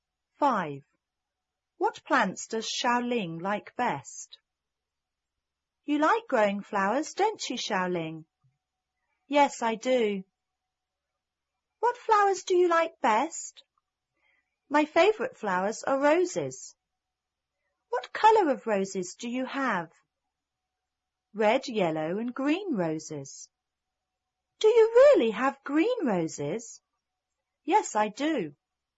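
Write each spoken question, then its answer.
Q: What plants does Xiaoling like best?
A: Roses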